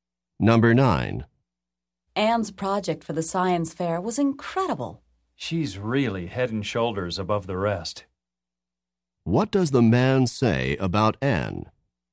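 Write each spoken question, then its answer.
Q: What does the man say about Anne?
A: Her project was much better than everyone else's.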